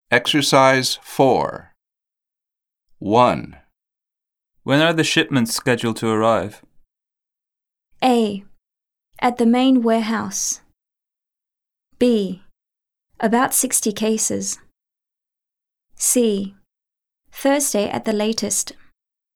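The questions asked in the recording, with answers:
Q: When are the shipments scheduled to arrive?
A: C: Thursday at the latest.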